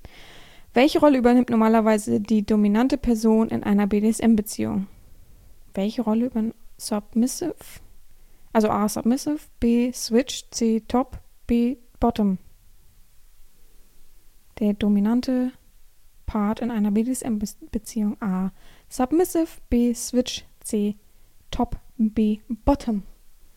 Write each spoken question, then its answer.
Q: Welche Rolle übernimmt normalerweise die dominante Person in einer BDSM-Beziehung?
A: Antwort 4 ist C, Top.